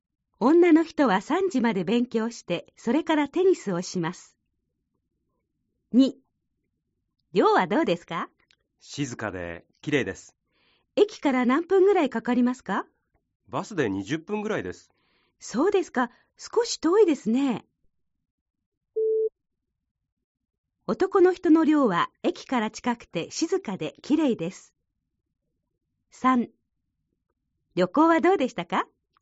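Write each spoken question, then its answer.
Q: 男の人の寮は駅から近くて静かで綺麗です。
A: 正しくない(×):駅からバスで20分で遠い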